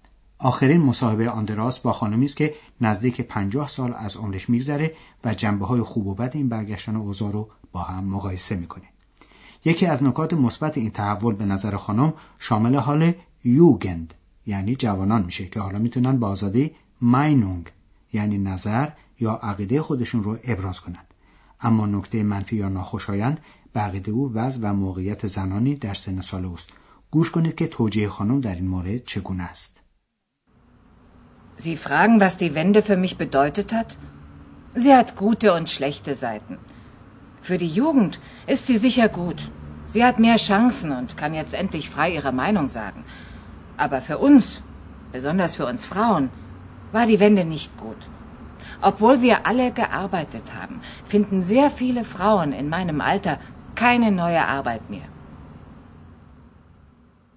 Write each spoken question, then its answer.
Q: گوش کنید که توجیه خانم در این مورد چگونه است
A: امروزه برای اونها و مخصوصا برای خانم های مسن کار جدید پیدا نمیشه.